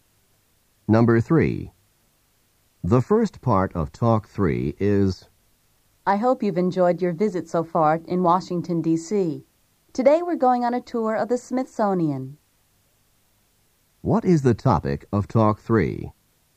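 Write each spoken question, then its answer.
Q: What is the topic of Talk 3?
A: A tour of the Smithsonian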